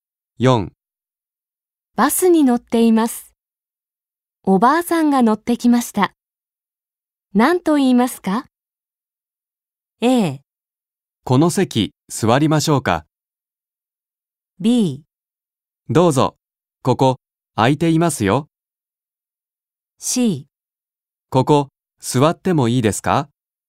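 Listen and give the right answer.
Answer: B: どうぞ、ここ、空いていますよ。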